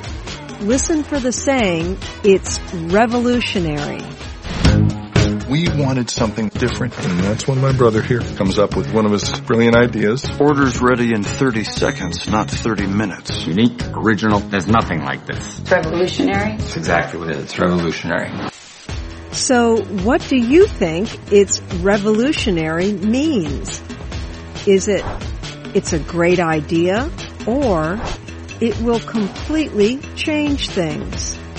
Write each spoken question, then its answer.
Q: So what do you think it's revolutionary means?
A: The term, it's revolutionary, means it will completely change things.